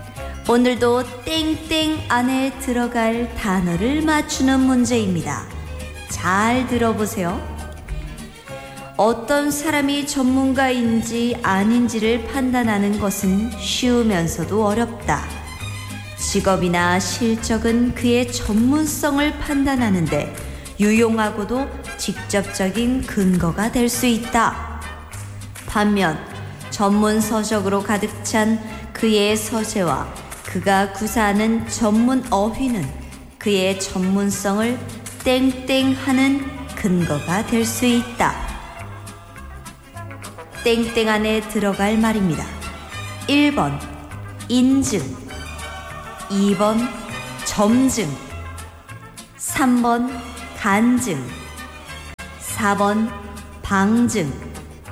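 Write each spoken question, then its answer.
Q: 땡땡 안에 들어갈 말입니다. 1번 인증, 2번 점증, 3번 간증, 4번 방증.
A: 4: 방증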